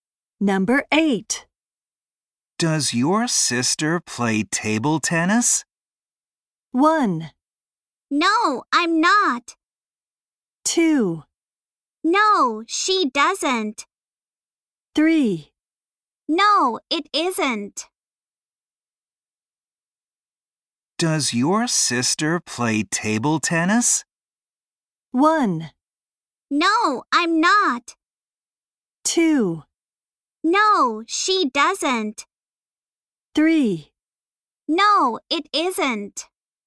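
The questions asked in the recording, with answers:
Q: Does your sister play table tennis?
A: 2: No, she doesn't.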